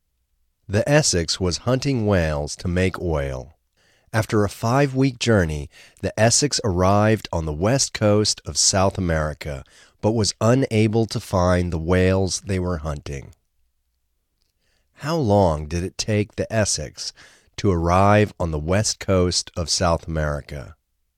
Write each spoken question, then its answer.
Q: How long did it take the Essex to arrive on the west coast of South America?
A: It took the Essex 5 weeks to arrive on the west coast of South America.